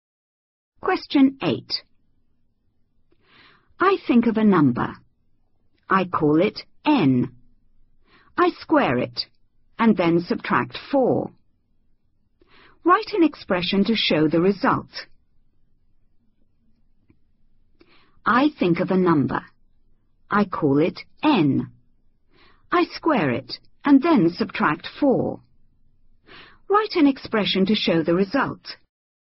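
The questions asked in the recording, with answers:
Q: Write an expression to show the result.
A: N2 − 4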